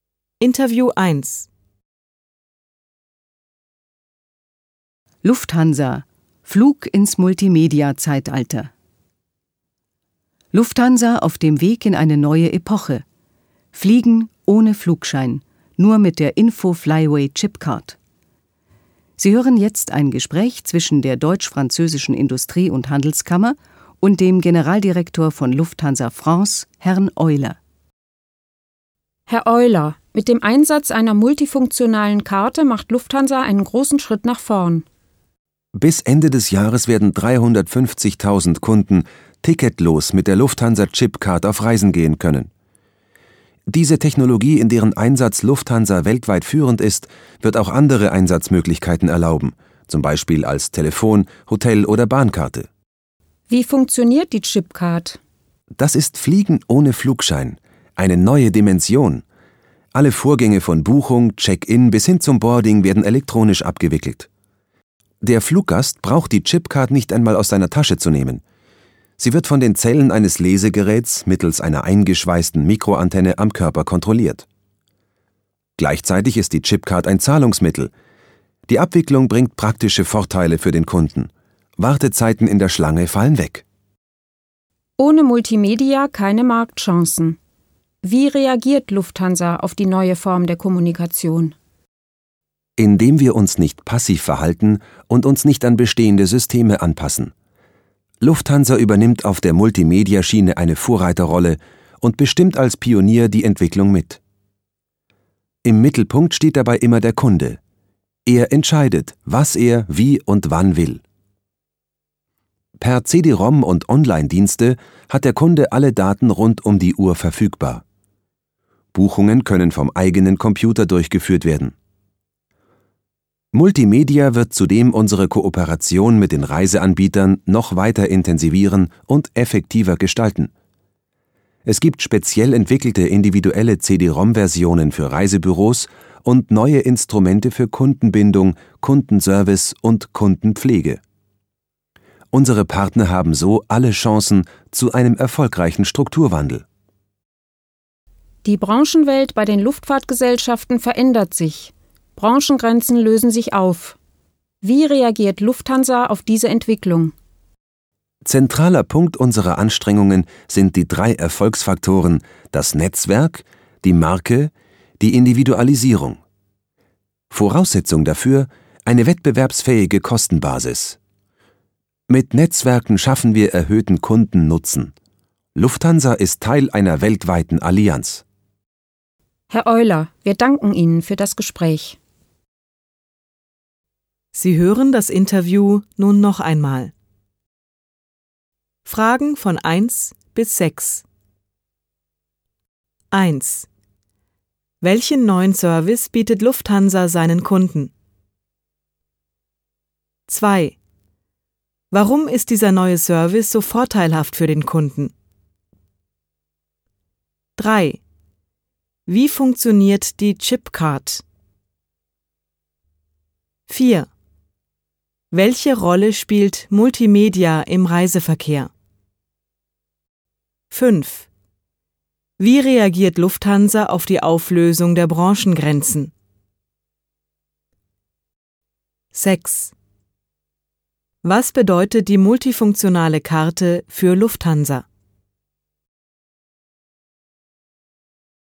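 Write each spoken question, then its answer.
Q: Welchen neuen Service bietet Lufthansa seinen Kunden?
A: Fliegen ohne Flugschein mit der Chipcard

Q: Warum ist dieser neue Service so vorteilhaft für den Kunden?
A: Wartezeiten in der Schlange fallen weg

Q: Wie funktioniert die Chipcard?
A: Alles wird elektronisch abgewickelt; ein Lesegerät kontrolliert die Karte über eine Mikroantenne, ohne dass man sie aus der Tasche nimmt

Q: Wie reagiert Lufthansa auf die Auflösung der Branchengrenzen?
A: Mit Netzwerk, Marke und Individualisierung; Teil einer weltweiten Allianz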